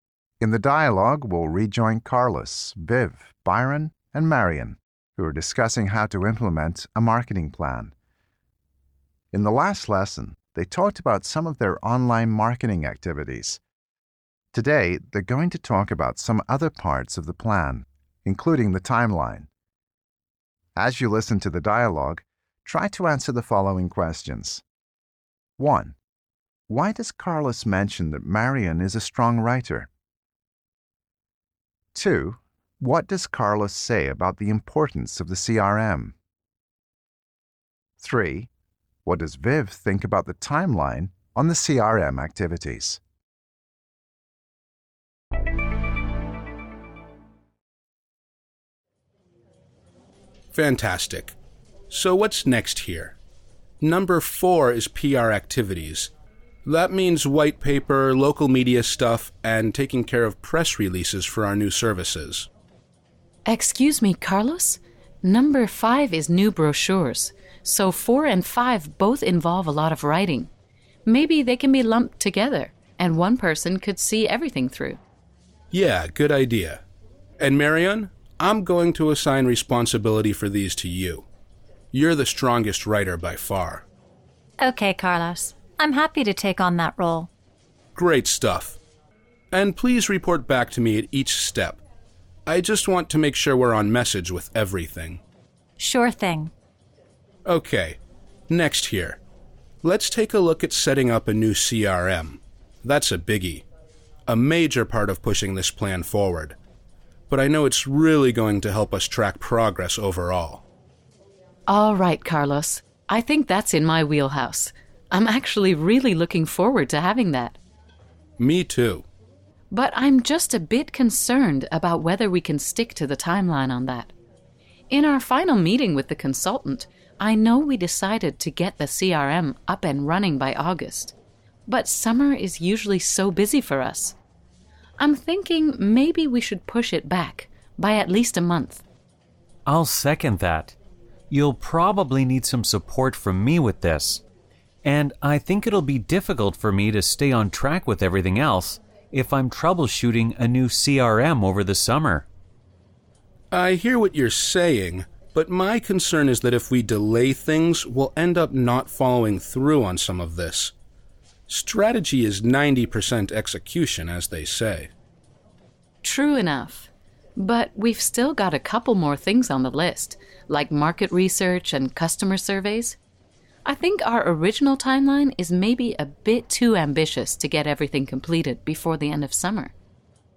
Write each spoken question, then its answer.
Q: Why does Carlos mention that Marion is a strong writer?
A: Carlos likes the idea of putting PR activities and new brochures together, and since they depend on good writing skills, he decides to assign responsibility for those activities to Marion.

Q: What does Carlos say about the importance of the CRM?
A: Carlos calls the new CRM a biggie, which is just a way of saying that it's a big or important piece of work.

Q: What does Viv think about the timeline on the CRM activities?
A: Viv believes it will be difficult to get the CRM up and running in August because summer is busy.